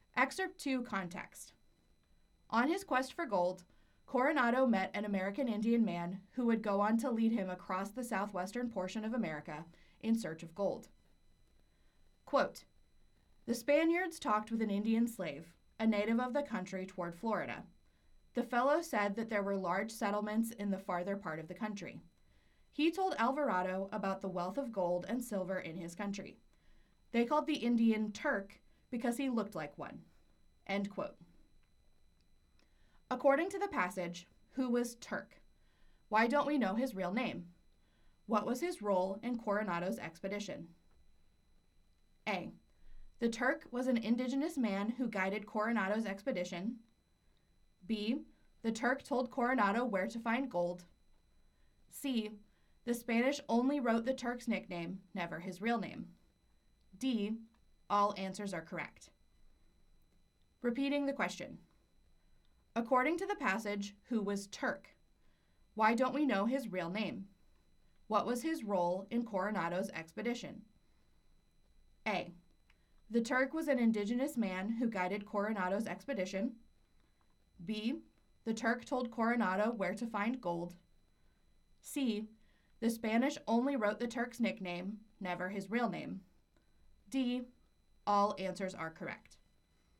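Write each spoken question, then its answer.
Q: According to the passage, who was Turk?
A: D: All answers are correct.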